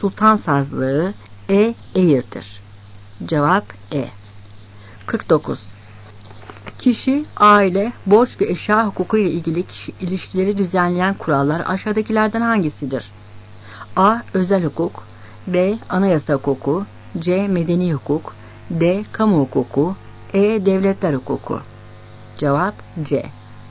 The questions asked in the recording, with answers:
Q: Kişi, aile, borç ve eşya hukuku ile ilgili ilişkileri düzenleyen kurallar aşağıdakilerden hangisidir?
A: Cevap C.